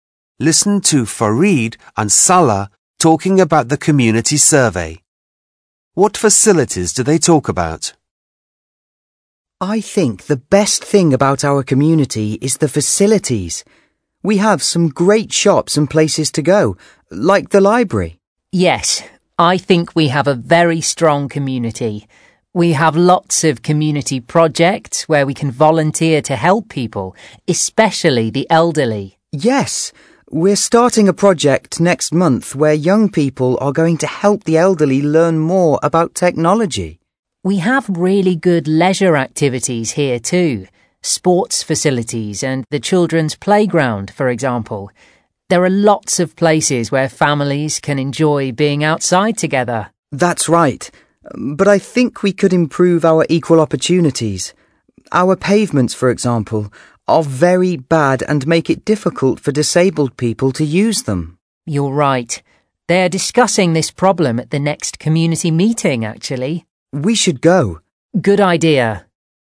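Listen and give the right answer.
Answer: shops, the library, sports facilities and the children's playground (and pavements)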